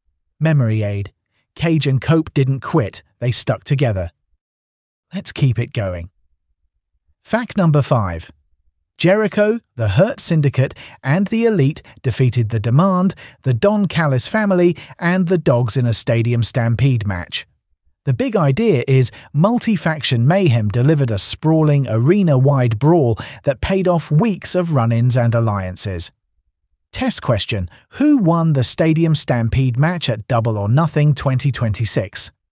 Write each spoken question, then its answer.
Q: Who won the Stadium Stampede match at Double or Nothing 2026?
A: Jericho, the Hurt Syndicate, and the Elite.